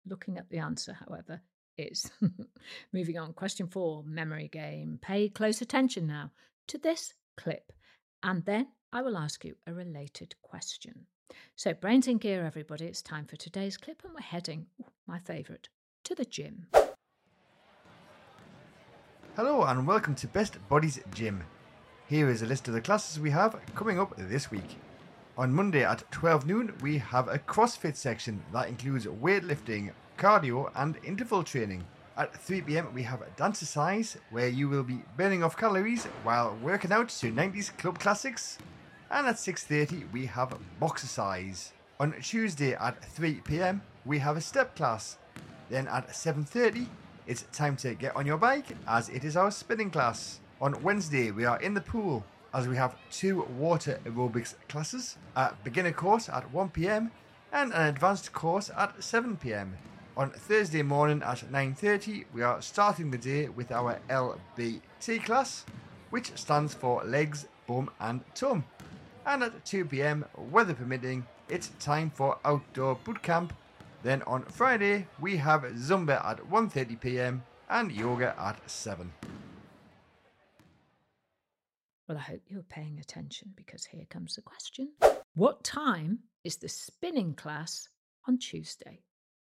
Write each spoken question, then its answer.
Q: What time is the spinning class on Tuesday?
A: And the answer was 7:30 p.m., 7:30 at night.